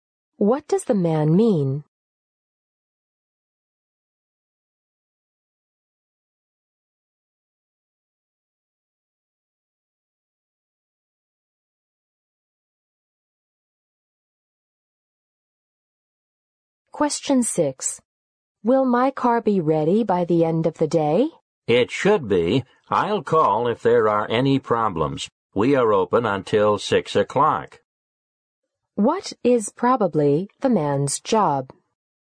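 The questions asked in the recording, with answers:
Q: What is probably the man's job?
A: A car mechanic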